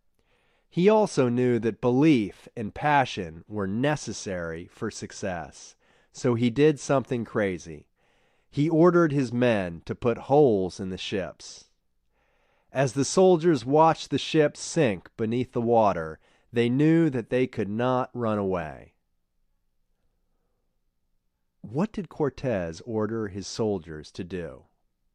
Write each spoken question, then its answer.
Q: What did Cortez order his soldiers to do?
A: He ordered his soldiers to put holes in the ships.